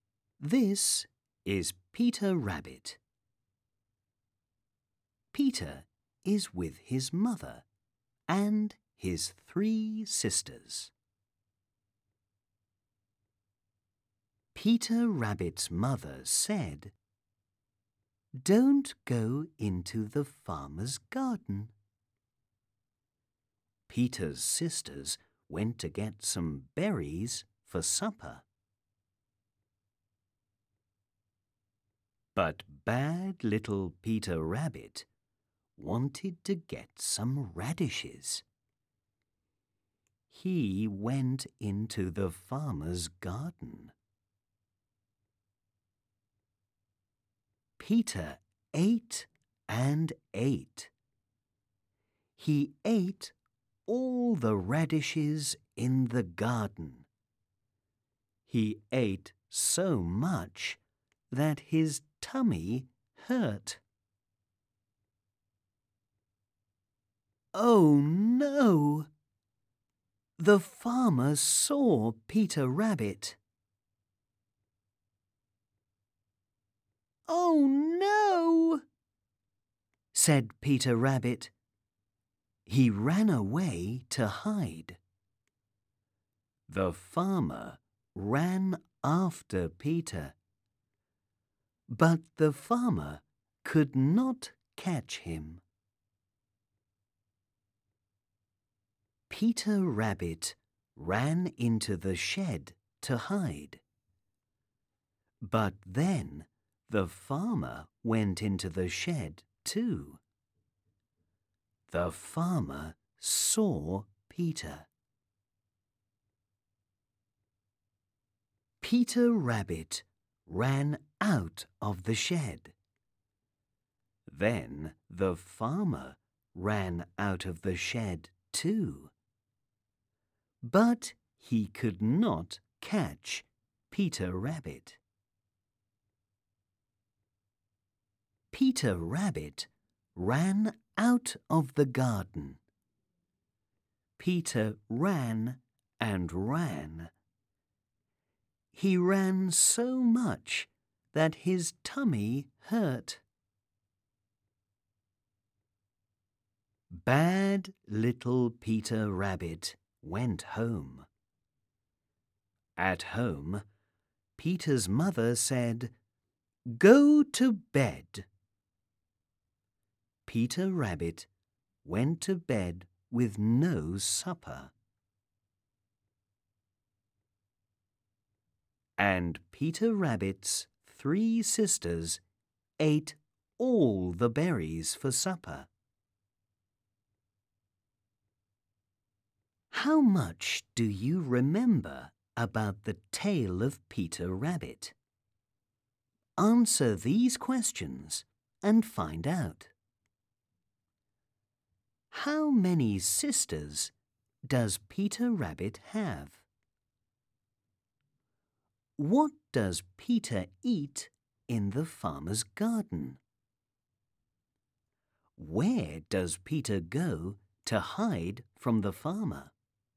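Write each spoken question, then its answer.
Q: How many sisters does Peter Rabbit have?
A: Three

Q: What does Peter eat in the farmer's garden?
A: Radishes

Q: Where does Peter go to hide from the farmer?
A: Into the shed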